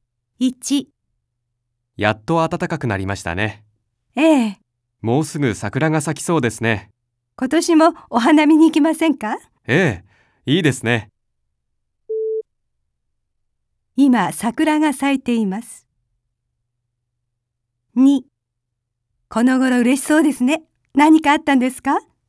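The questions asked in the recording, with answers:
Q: 今桜が咲いています。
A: ×(まだ咲いていない)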